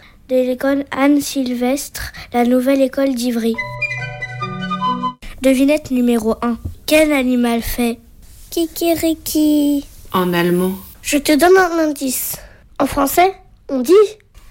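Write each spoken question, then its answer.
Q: Quel animal fait ?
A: le coq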